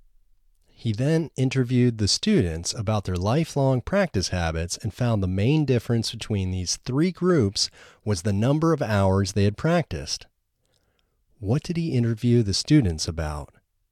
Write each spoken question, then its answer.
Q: What did he interview the students about?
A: He interviewed the students about their lifelong practice habits.